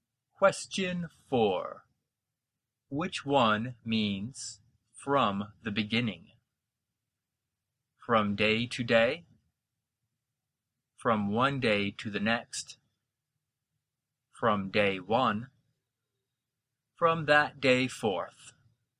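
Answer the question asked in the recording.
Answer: C: from day one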